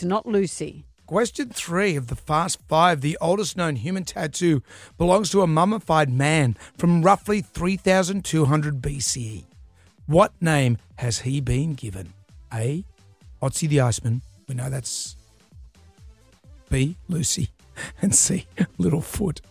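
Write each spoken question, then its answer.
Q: What name has he been given?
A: A: Otzi the Iceman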